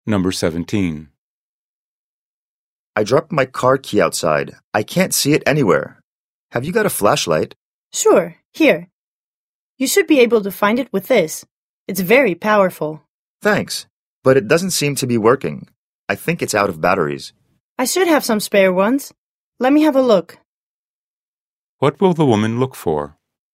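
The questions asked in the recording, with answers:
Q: What will the woman look for?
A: spare batteries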